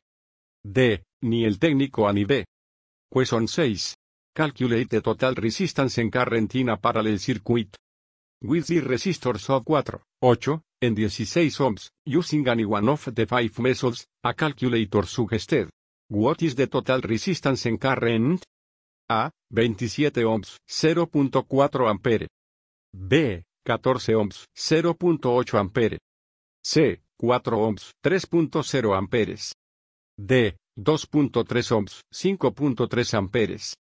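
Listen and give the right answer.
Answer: D: 2.3 ohms, 5.3 amperes.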